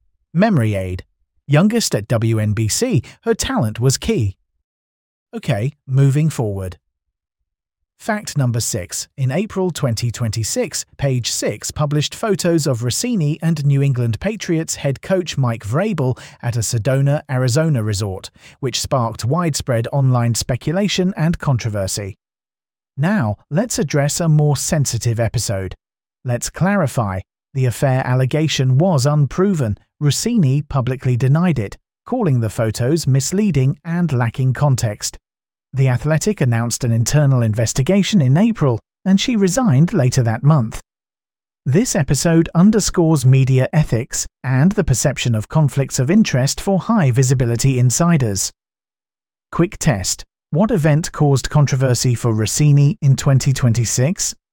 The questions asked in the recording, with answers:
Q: What event caused controversy for Rossini in 2026?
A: Correct answer, photos with Mike Vrabel in Sedona.